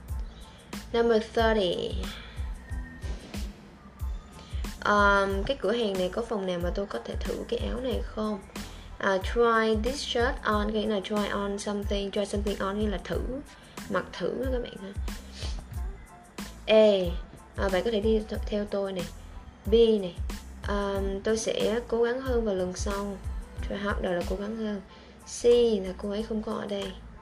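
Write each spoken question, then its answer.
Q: cái cửa hàng này có phòng nào mà tôi có thể thử cái áo này không?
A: A: Bạn có thể đi theo tôi.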